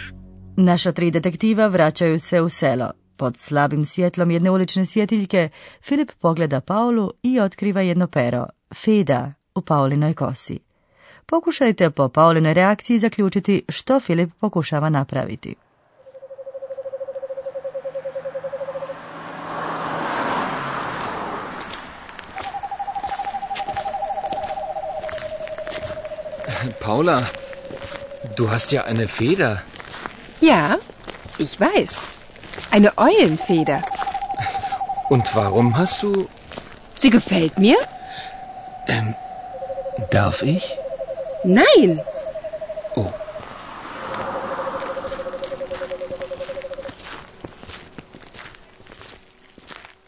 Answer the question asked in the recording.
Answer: Filip pokušava izvući pero iz Pauline kose.